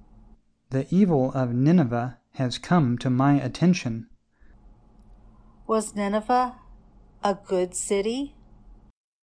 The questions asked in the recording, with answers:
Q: Was Nineveh a good city?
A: No. Nineveh was evil.